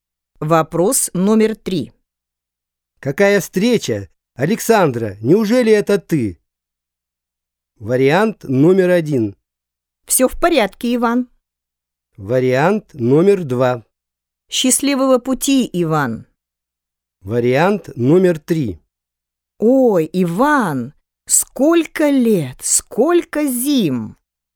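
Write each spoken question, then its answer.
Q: Какая встреча? Александра, неужели это ты?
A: 3: Ой, Иван, сколько лет, сколько зим!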